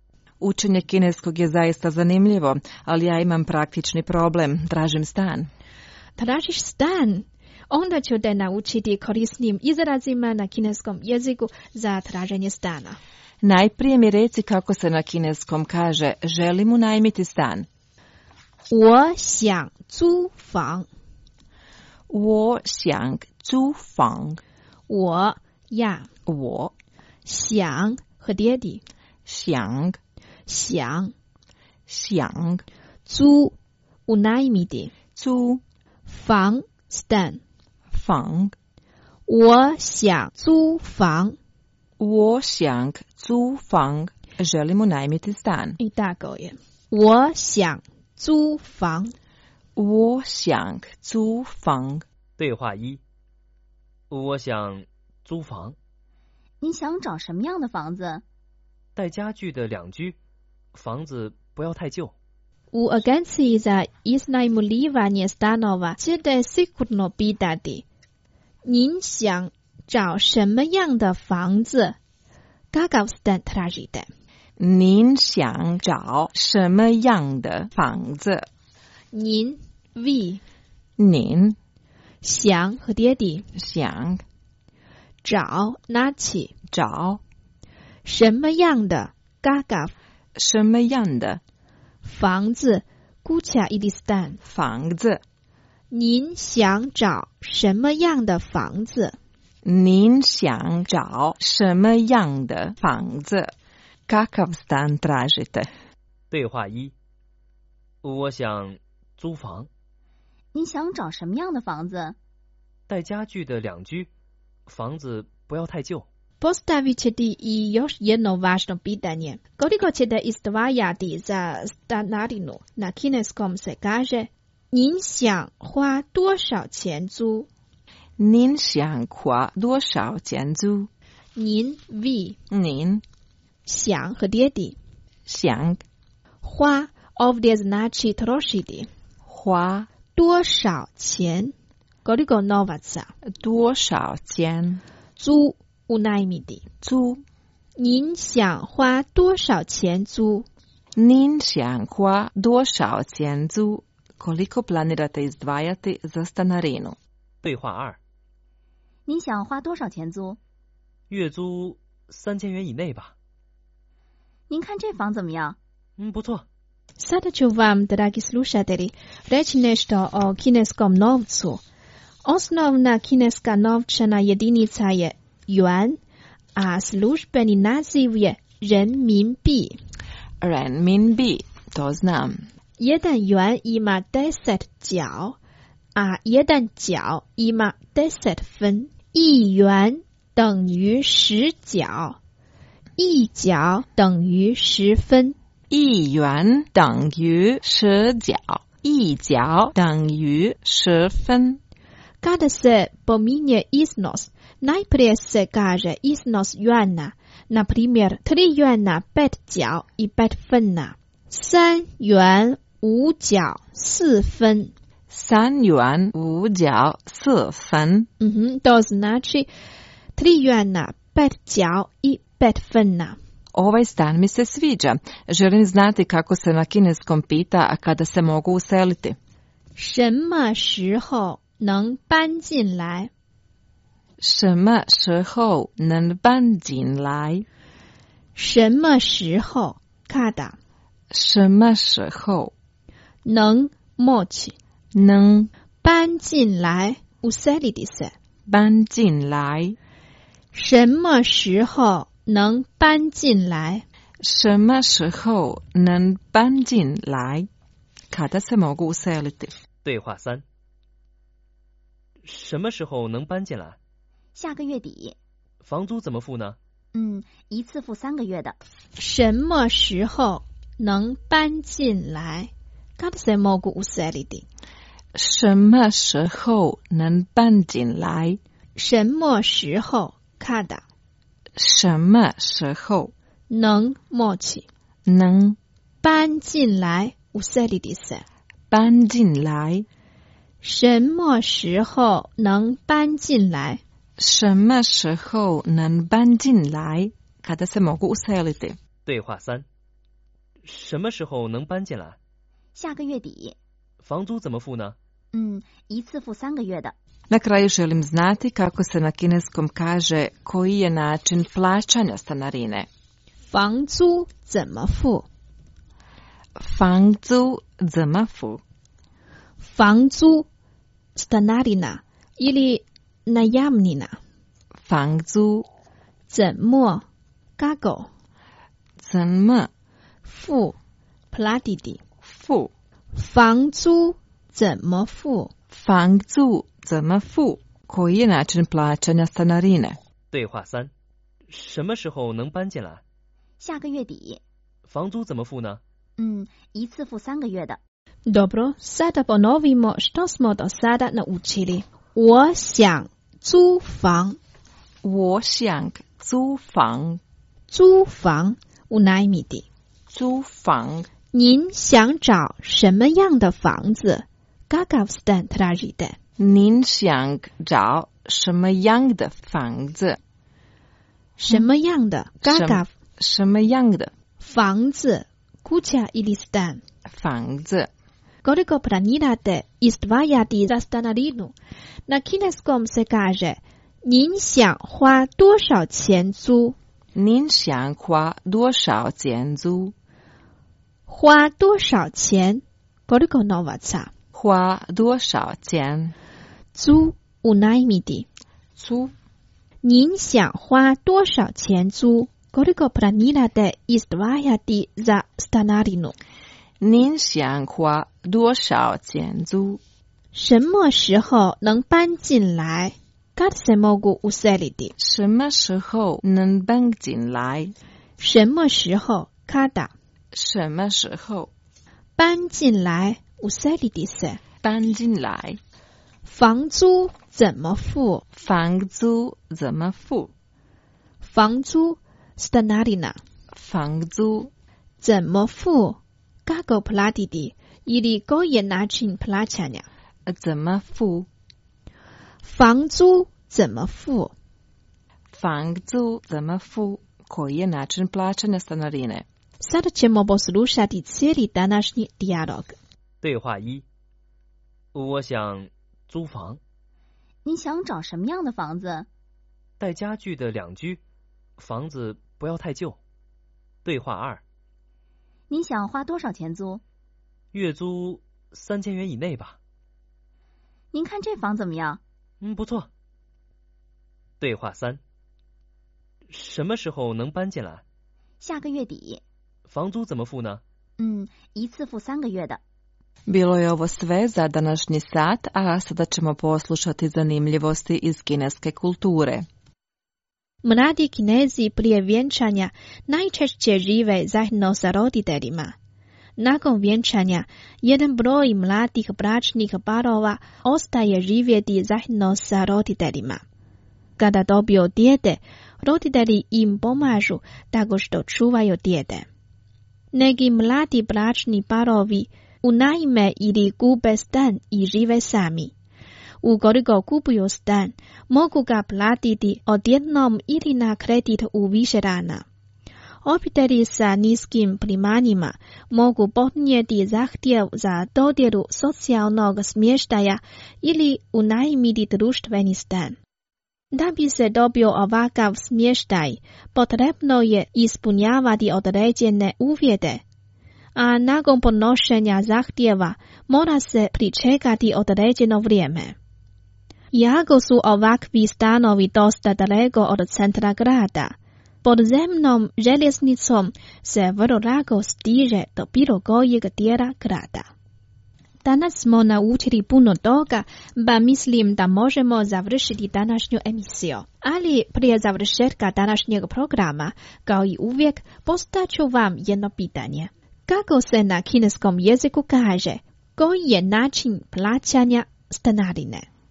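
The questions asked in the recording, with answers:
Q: Kako se na kineskom jeziku kaže, koji je način plaćanja stanarine?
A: 房租怎么付?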